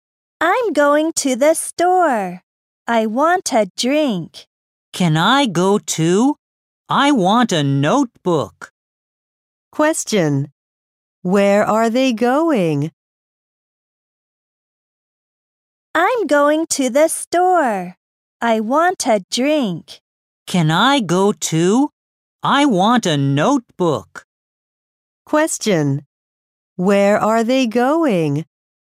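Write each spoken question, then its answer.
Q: Where are they going?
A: To the store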